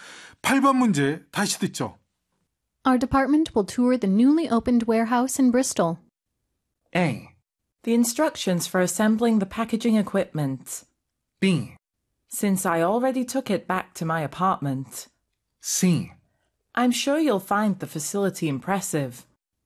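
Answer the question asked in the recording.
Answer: C: I'm sure you'll find the facility impressive.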